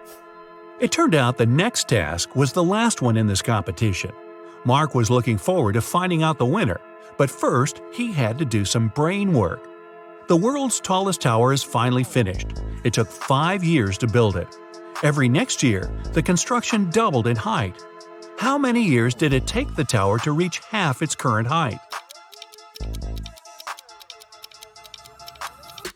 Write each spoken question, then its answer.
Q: How many years did it take the tower to reach half its current height?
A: Four years.